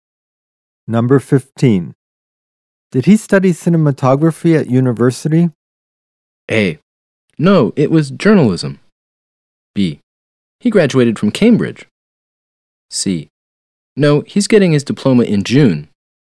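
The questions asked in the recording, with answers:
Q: Did he study cinematography at university?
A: A: No, it was journalism.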